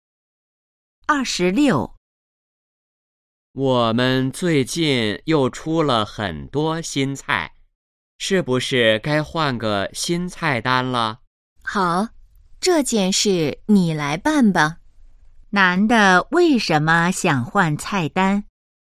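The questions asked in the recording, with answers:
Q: 男的为什么想换菜单?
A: 最近出了很多新菜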